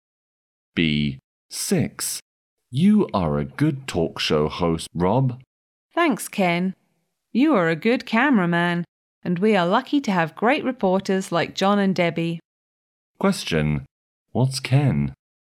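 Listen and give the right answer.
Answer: A cameraman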